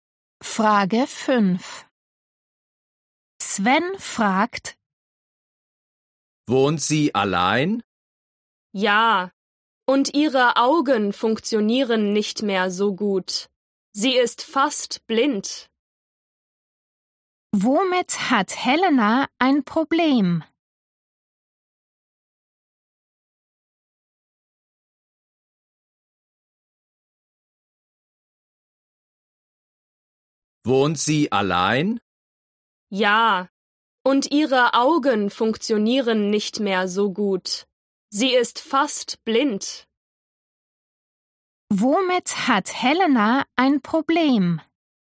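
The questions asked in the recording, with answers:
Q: Womit hat Helena ein Problem?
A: mit den Augen (sie ist fast blind)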